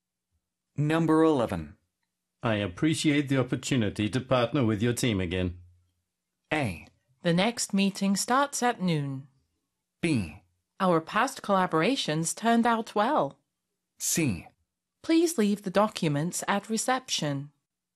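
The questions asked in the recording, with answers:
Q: I appreciate the opportunity to partner with your team again.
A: B: Our past collaborations turned out well.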